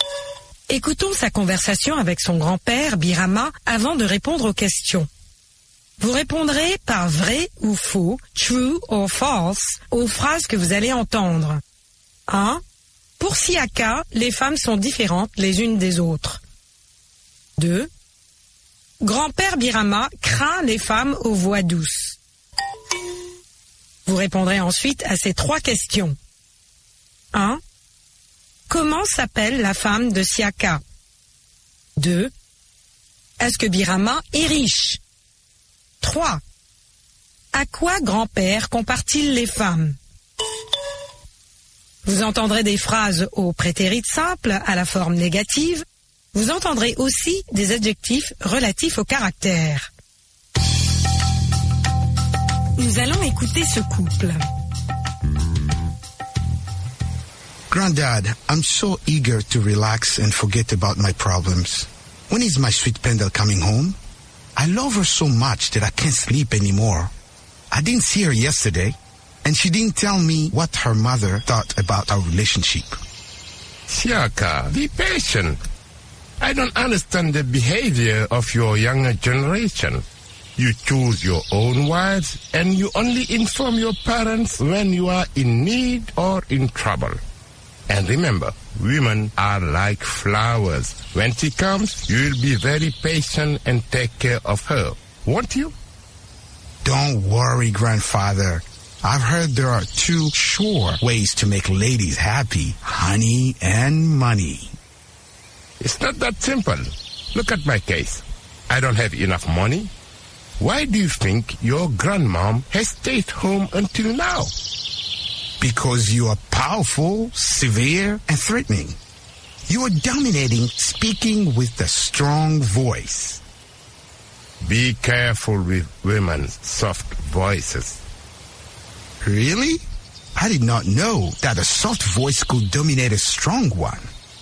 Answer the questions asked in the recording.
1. l'énoncé 1 est faux.
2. L'énoncé 2 est vrai.
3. La femme de Siaka s'appelle Pendel.
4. Non, Birama n'est pas riche, mais patient.
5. Grand-père compare les femmes aux fleurs.